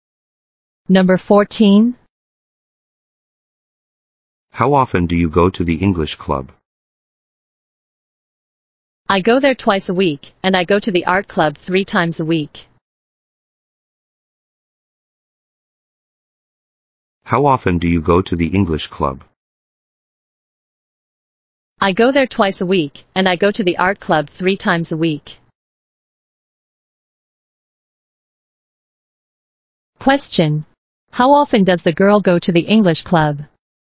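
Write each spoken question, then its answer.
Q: How often does the girl go to the English club?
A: Twice a week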